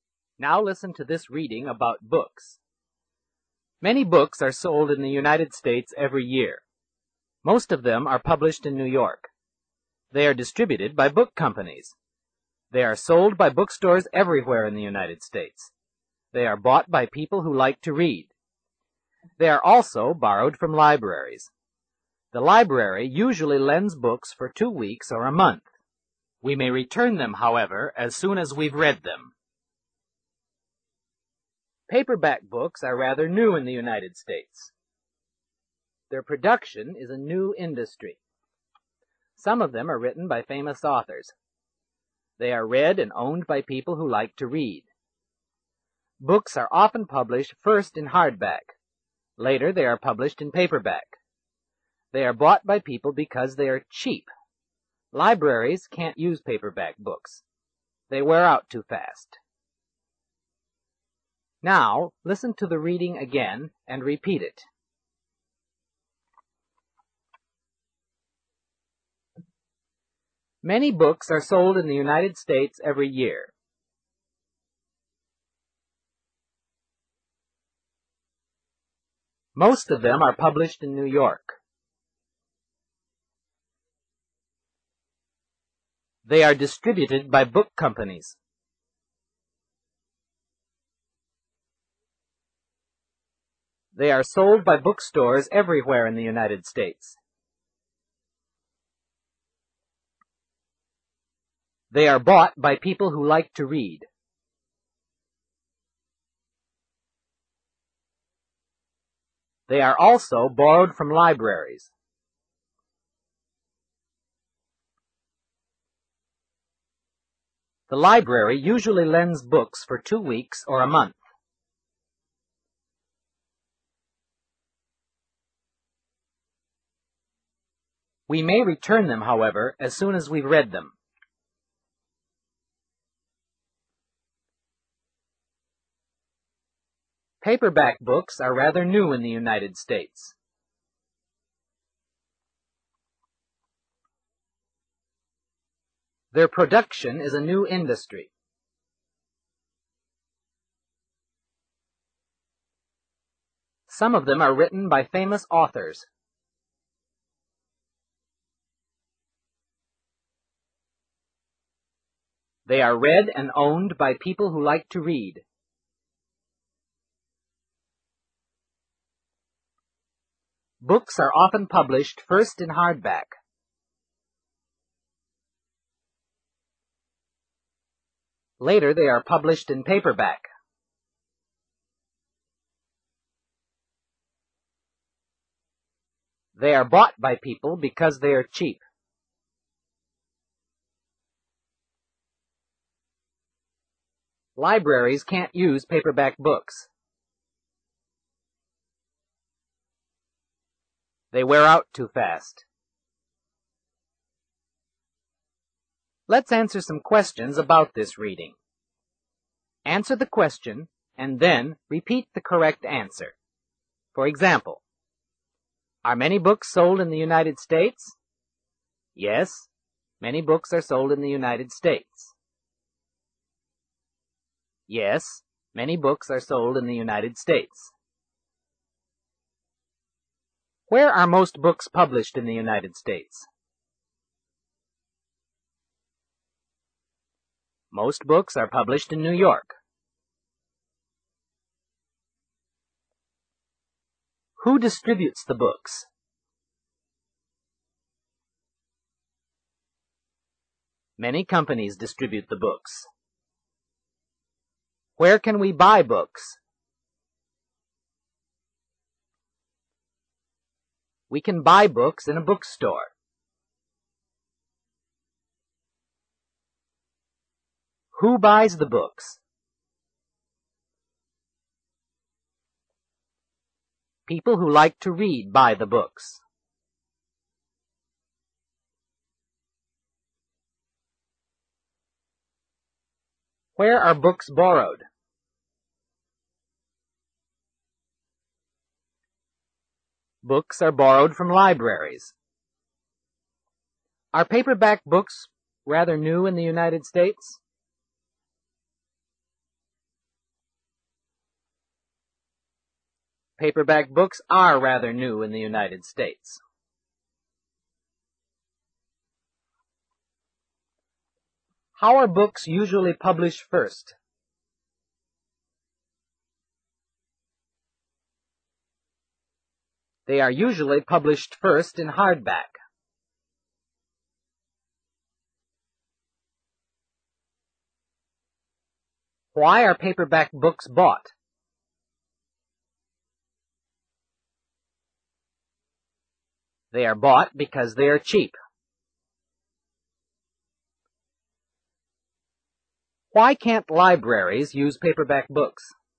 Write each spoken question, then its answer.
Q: Where are most books published in the United States?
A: Most books are published in New York.

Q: Who distributes the books?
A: Many companies distribute the books.

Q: Where can we buy books?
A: We can buy books in a bookstore.

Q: Who buys the books?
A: People who like to read buy the books.

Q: Where are books borrowed?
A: Books are borrowed from libraries.

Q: Are paperback books rather new in the United States?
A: Paperback books are rather new in the United States.

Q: How are books usually published first?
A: They are usually published first in hardback.

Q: Why can't libraries use paperback books?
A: They wear out too fast.